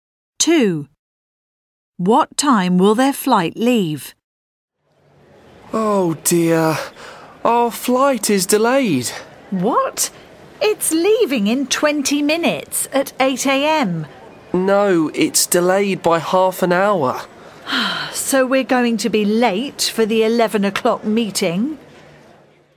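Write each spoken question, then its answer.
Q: What time will their flight leave?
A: 8:30 a.m.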